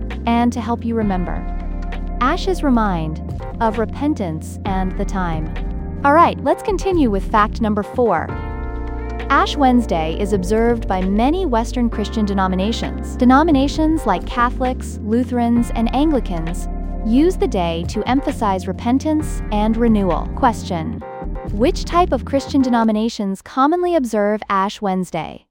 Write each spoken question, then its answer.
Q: which type of Christian denominations commonly observe Ash Wednesday?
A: Western Christian denominations.